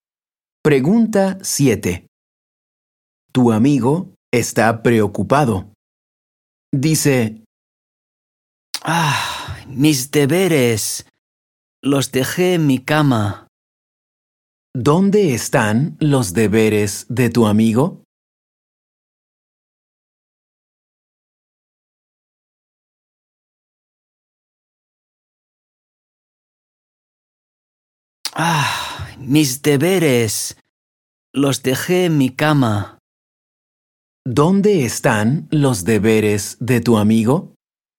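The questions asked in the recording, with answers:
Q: ¿Dónde están los deberes de tu amigo?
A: En su cama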